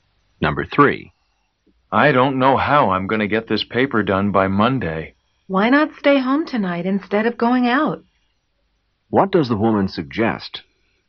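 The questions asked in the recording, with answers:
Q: What does the woman suggest?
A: That he stay home tonight to work on the paper.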